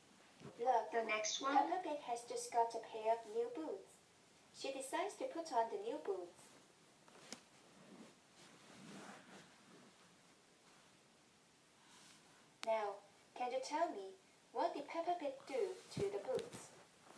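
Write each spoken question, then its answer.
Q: Now, can you tell me, what did Peppa Pig do to the boots?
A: She put on the new boots.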